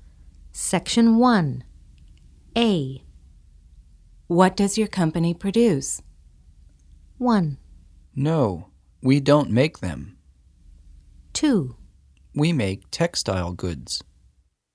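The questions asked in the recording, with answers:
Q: What does your company produce?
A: 2: We make textile goods.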